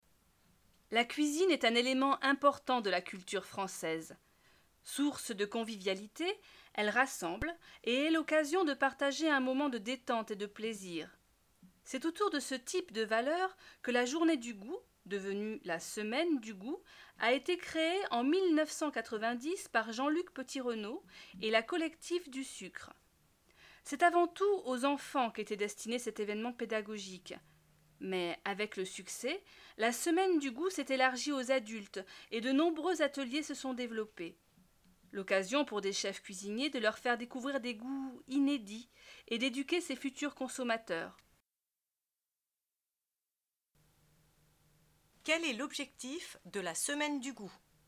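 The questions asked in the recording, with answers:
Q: Quel est l'objectif de la Semaine du goût ?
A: Faire découvrir des goûts inédits et éduquer les (futurs) consommateurs, d'abord les enfants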